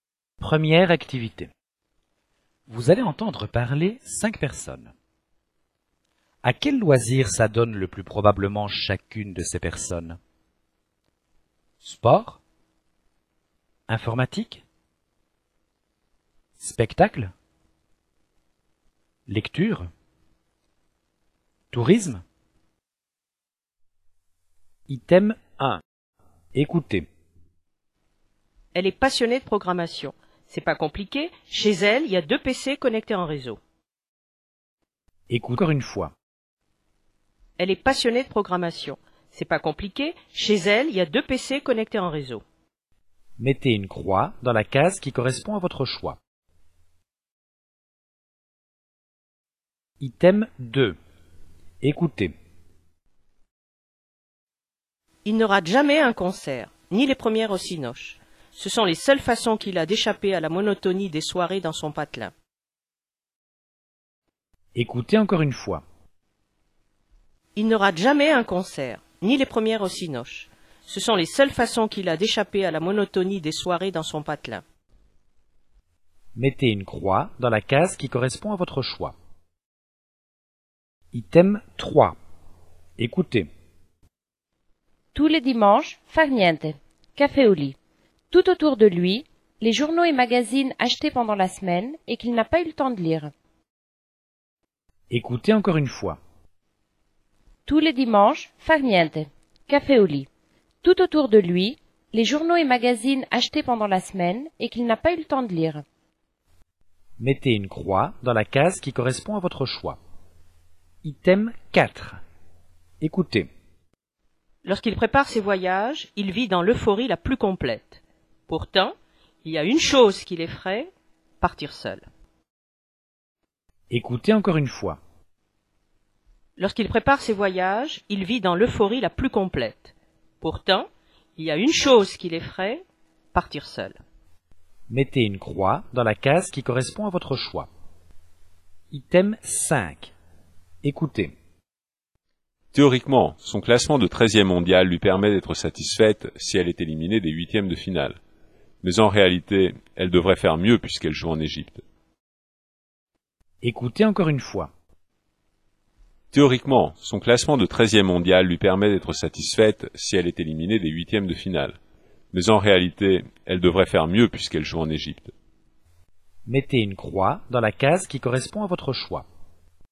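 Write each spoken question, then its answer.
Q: À quel loisir s'adonne le plus probablement chacune de ces personnes? Sport? Informatique? Spectacle? Lecture? Tourisme?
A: Informatique

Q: À quel loisir s'adonne le plus probablement chacune de ces personnes? Sport? Informatique? Spectacle? Lecture? Tourisme?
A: Spectacle

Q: À quel loisir s'adonne le plus probablement chacune de ces personnes? Sport? Informatique? Spectacle? Lecture? Tourisme?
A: Lecture

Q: À quel loisir s'adonne le plus probablement chacune de ces personnes? Sport? Informatique? Spectacle? Lecture? Tourisme?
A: Tourisme

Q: À quel loisir s'adonne le plus probablement chacune de ces personnes? Sport? Informatique? Spectacle? Lecture? Tourisme?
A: Sport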